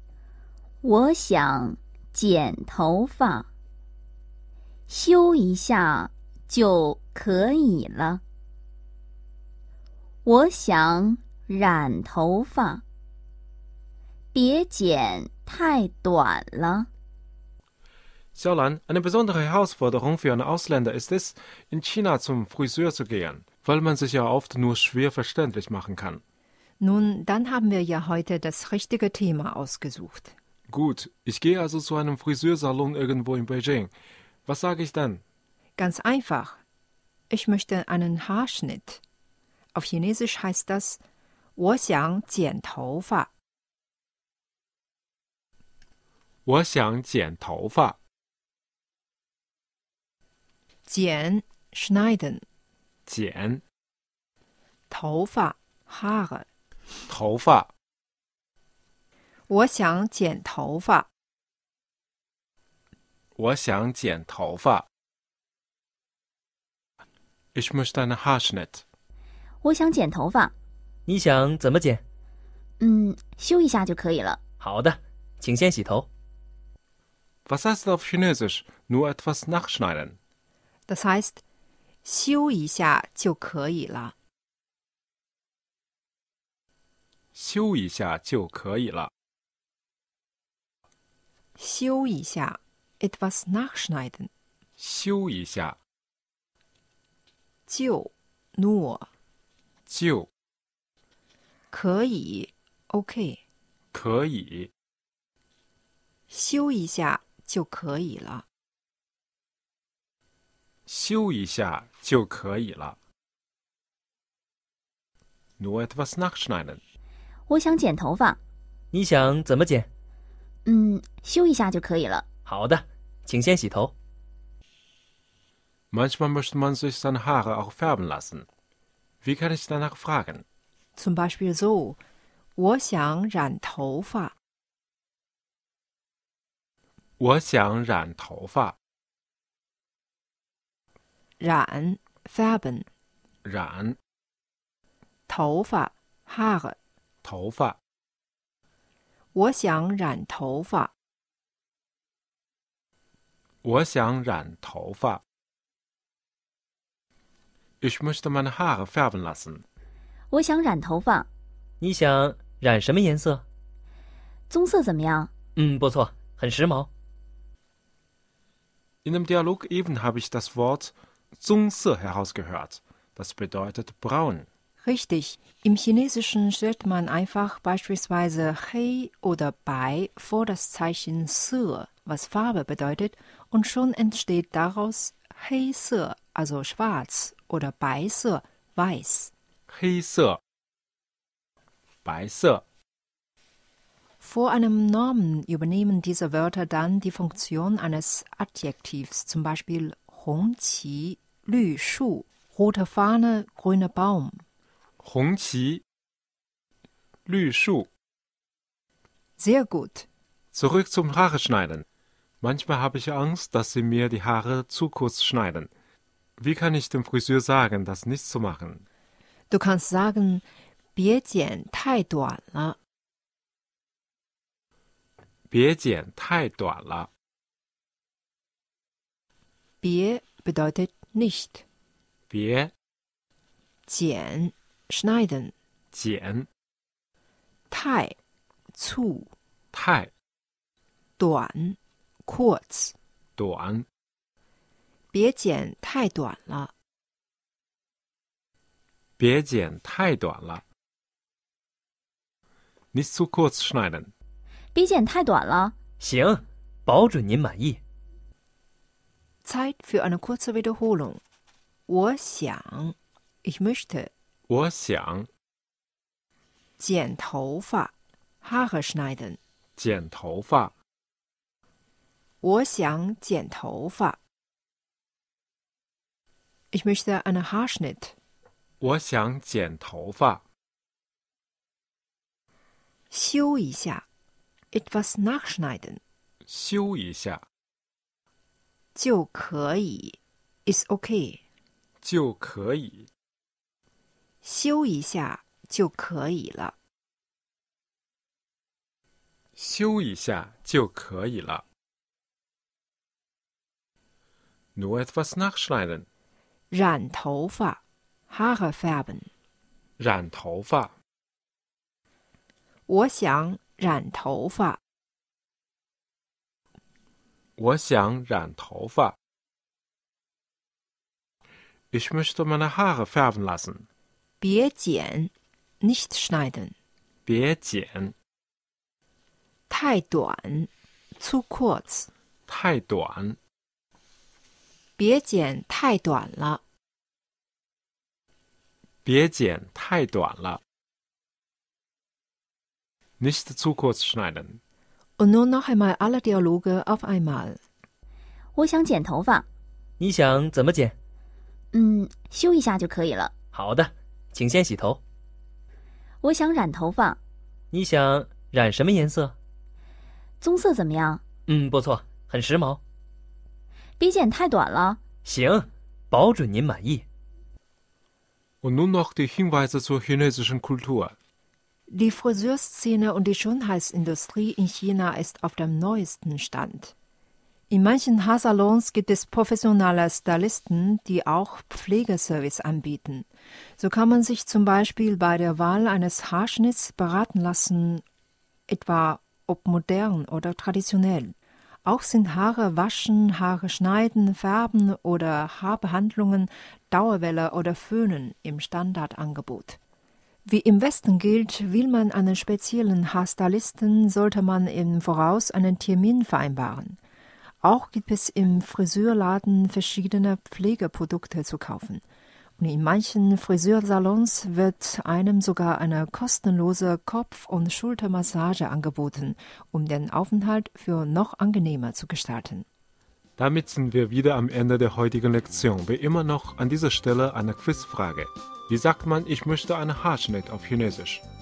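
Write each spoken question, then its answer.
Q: Wie sagt man, ich möchte einen Haarschnitt auf Chinesisch?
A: 我想剪头发 (Wo xiang jian toufa)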